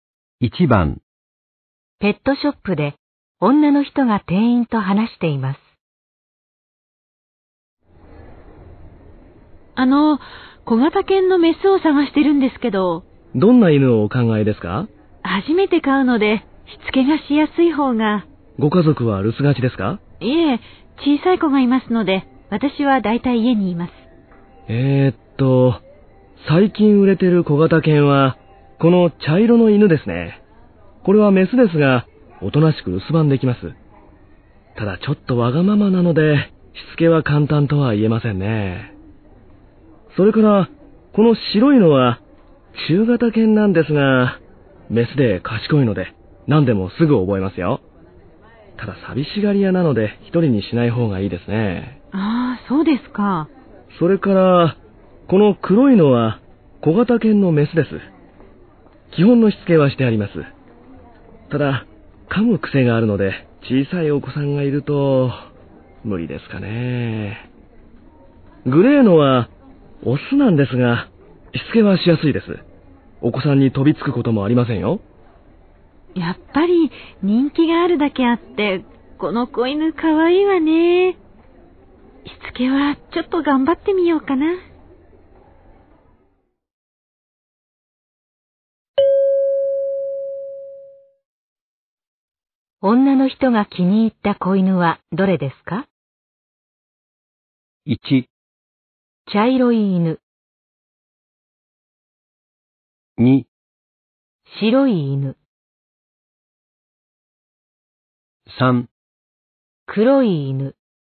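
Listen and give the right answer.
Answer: 1: 茶色い犬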